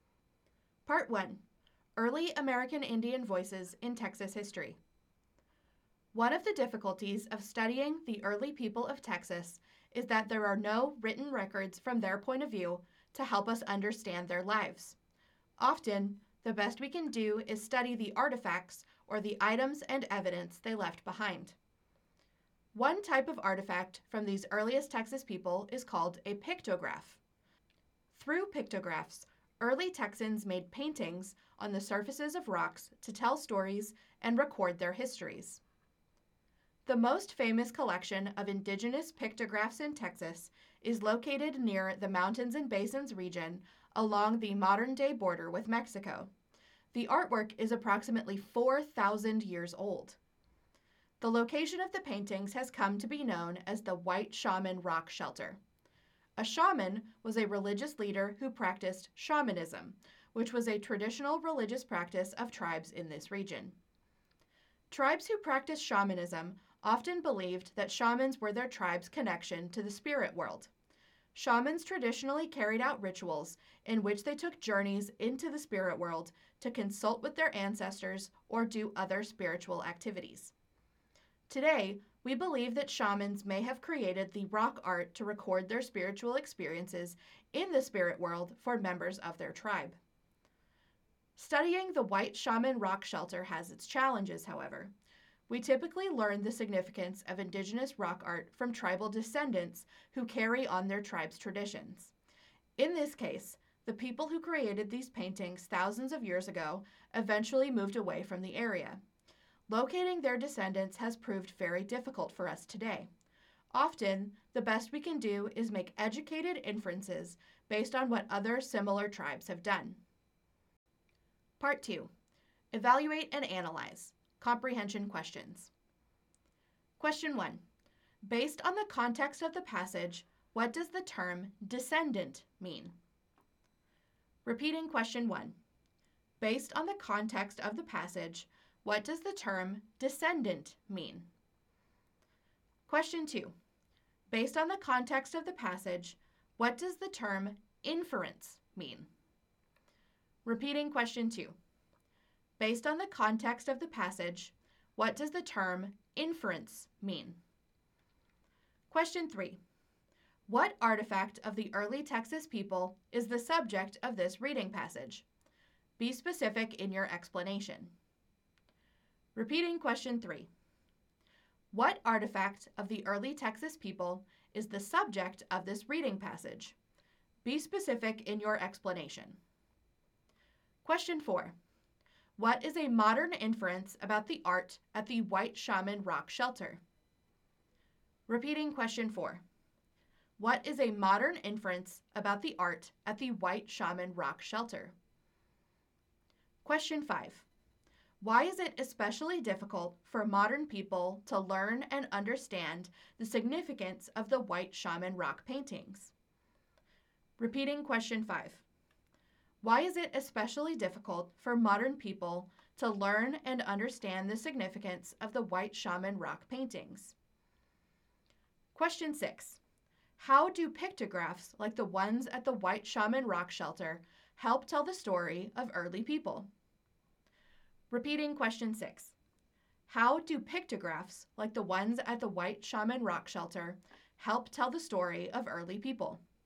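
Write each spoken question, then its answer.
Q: Based on the context of the passage, what does the term descendant mean?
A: A later family member of a tribe who carries on its traditions

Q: Based on the context of the passage, what does the term inference mean?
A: An educated guess based on evidence, such as what similar tribes did

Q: What artifact of the early Texas people is the subject of this reading passage?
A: Pictographs: rock paintings at the White Shaman Rock Shelter

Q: What is a modern inference about the art at the White Shaman Rock Shelter?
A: Shamans may have made it to record their spiritual experiences in the spirit world for their tribe

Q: Why is it especially difficult for modern people to learn and understand the significance of the White Shaman Rock paintings?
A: The creators moved away and their descendants are very hard to find

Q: How do pictographs like the ones at the White Shaman Rock Shelter help tell the story of early people?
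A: They tell stories and record histories in paintings, since there are no written records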